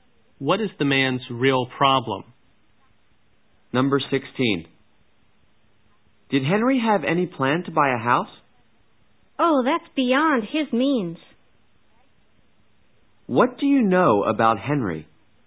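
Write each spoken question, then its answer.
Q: What do you know about Henry?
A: He can't afford to buy a house.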